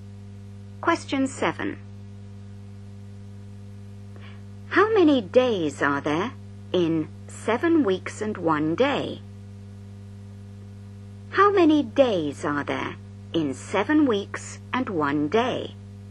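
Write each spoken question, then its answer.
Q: How many days are there in 7 weeks and 1 day?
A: 50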